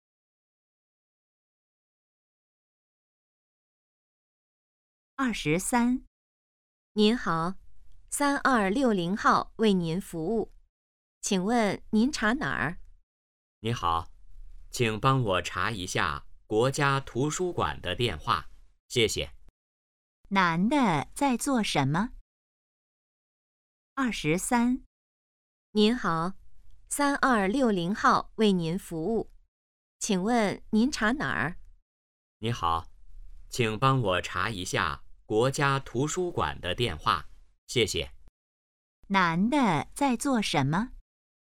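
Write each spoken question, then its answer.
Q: 男的在做什么?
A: 打电话查电话号码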